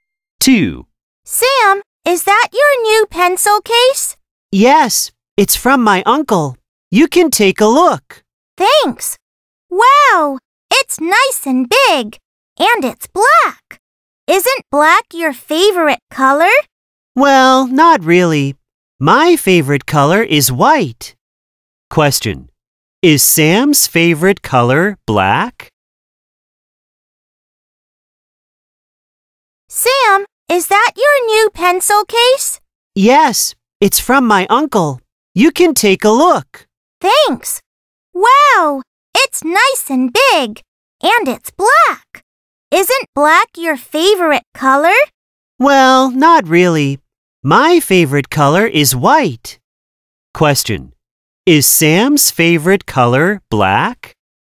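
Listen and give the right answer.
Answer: No, it's white.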